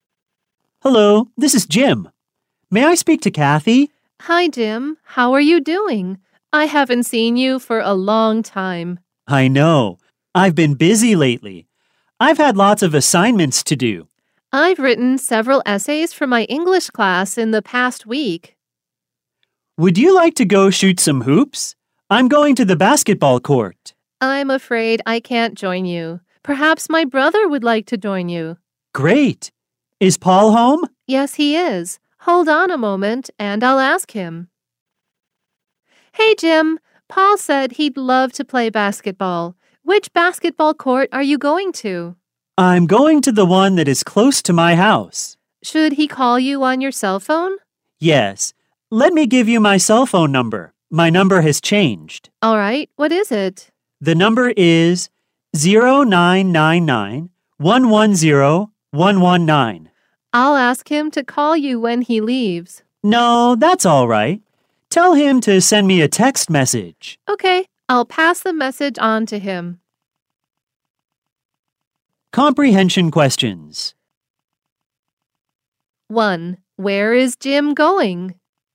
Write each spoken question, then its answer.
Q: Where is Jim going?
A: He is going to the basketball court.